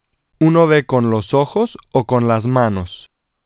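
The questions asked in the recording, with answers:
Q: ¿Uno ve con los ojos o con las manos?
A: con los ojos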